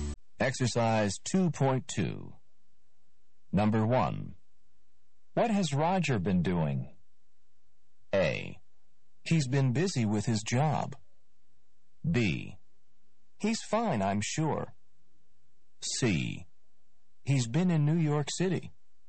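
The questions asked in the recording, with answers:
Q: What has Roger been doing?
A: A: He's been busy with his job.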